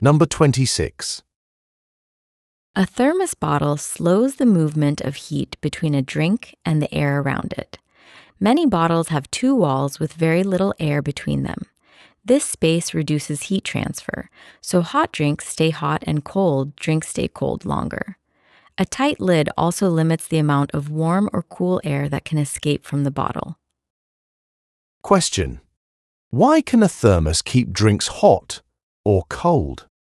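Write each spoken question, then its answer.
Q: why can a thermos keep drinks hot or cold?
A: It slows heat movement between the drink and the air, using two walls with little air between them and a tight lid.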